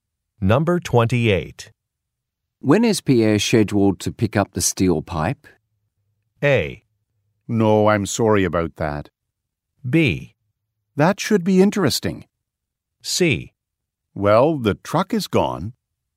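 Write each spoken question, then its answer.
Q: When is Pierre scheduled to pick up the steel pipe?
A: C: Well, the truck is gone.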